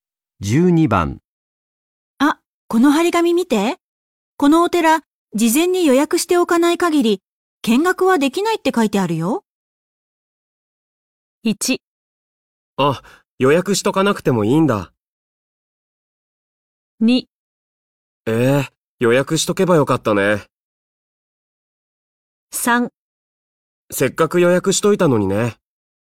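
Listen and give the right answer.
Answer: 2: ええ予約しとけばよかったね。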